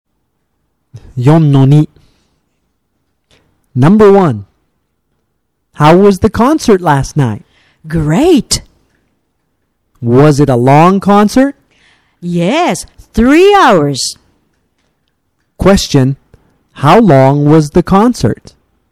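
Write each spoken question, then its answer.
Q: Question, how long was the concert?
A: 3 hours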